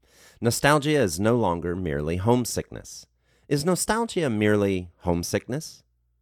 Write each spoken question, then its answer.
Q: Is nostalgia merely homesickness?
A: No, nostalgia is no longer merely homesickness.